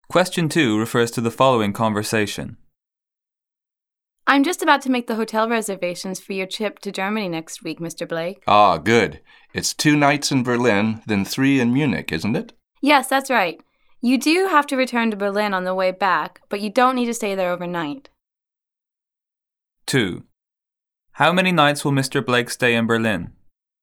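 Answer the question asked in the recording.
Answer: 2 nights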